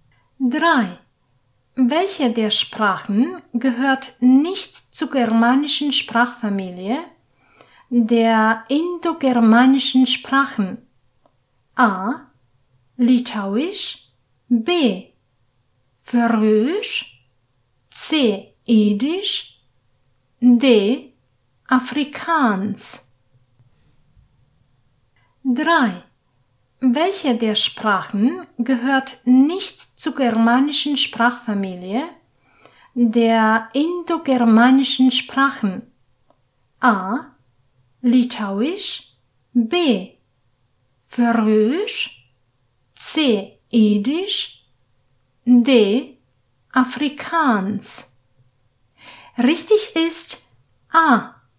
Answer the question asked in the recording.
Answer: Richtig ist A.